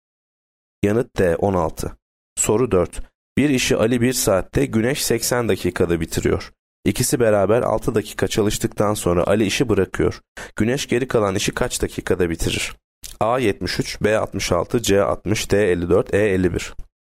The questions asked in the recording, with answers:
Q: Güneş geri kalan işi kaç dakikada bitirir?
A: Yanıt B 66.